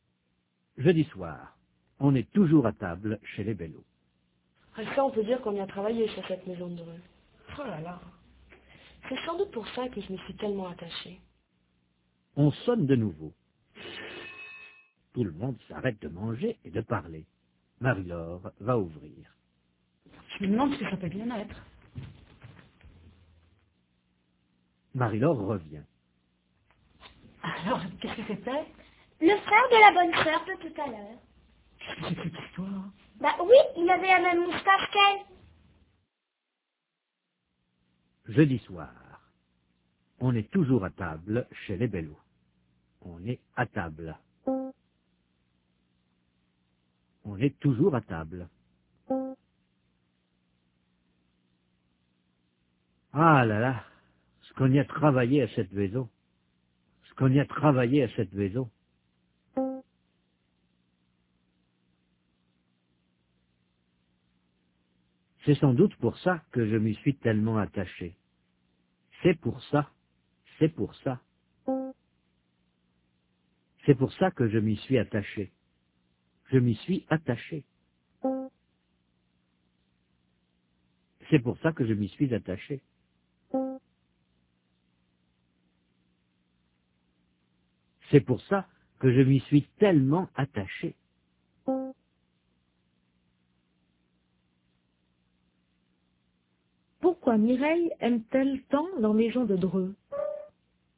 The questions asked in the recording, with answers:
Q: Pourquoi Mireille aime-t-elle tant la maison de Dreux?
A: Parce qu'ils y ont beaucoup travaillé.